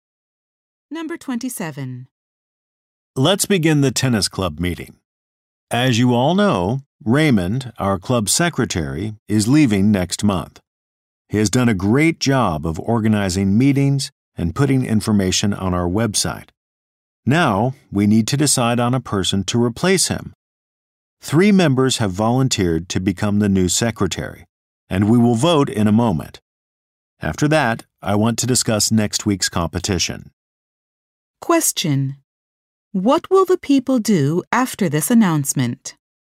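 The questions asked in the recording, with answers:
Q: What will the people do after this announcement?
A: Vote for a new secretary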